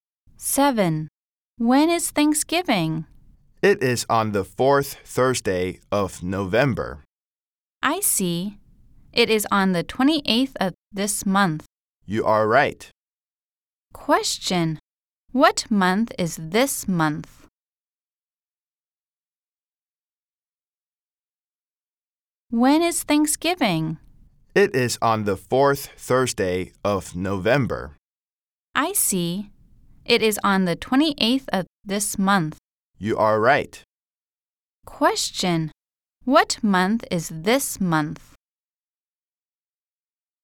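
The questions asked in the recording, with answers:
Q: Question. What month is this month?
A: November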